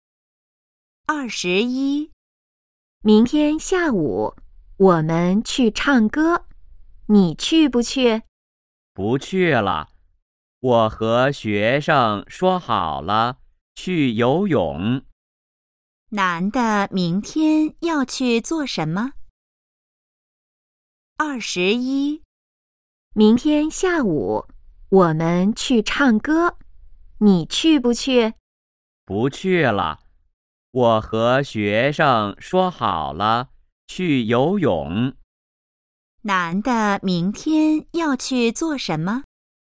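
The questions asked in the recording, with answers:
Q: 男的明天要去做什么?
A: 去游泳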